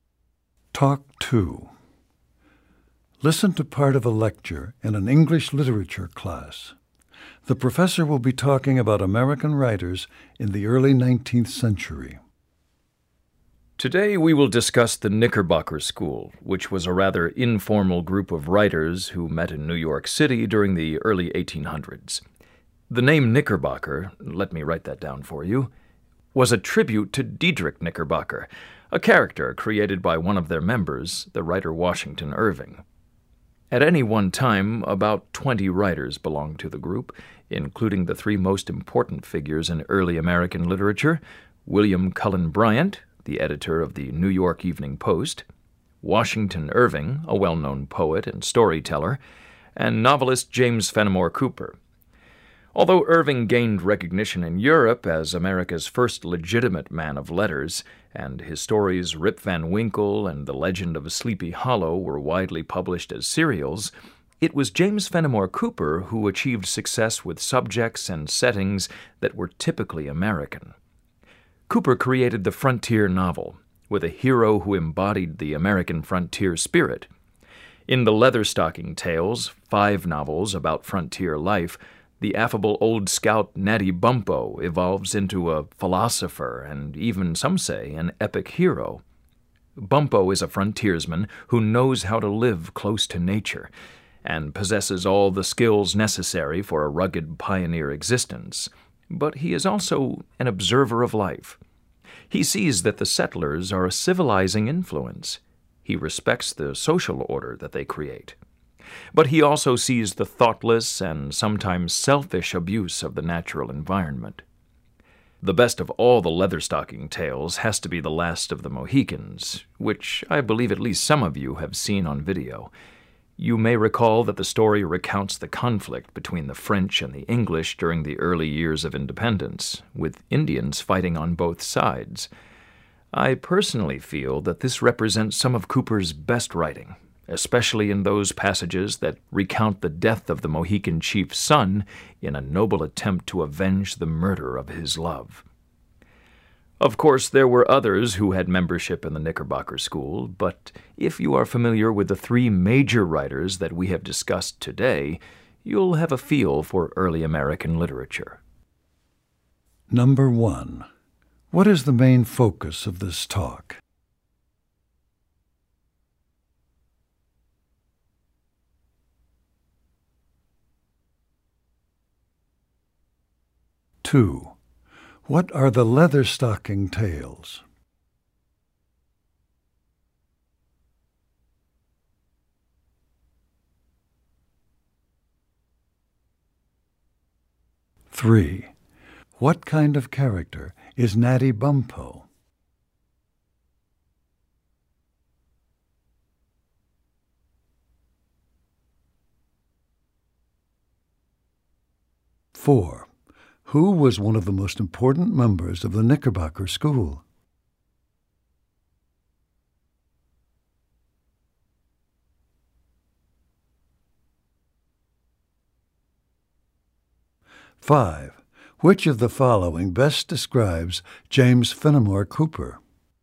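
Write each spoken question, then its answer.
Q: what is the main focus of this talk?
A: The Knickerbocker School of early American writers

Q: what are the Leatherstocking tales?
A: Five novels by Cooper about frontier life

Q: what kind of character is Natty Bumppo?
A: A frontiersman and observer of life, a philosopher and epic hero

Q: who was one of the most important members of the Knickerbocker School?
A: Washington Irving (also Bryant or Cooper)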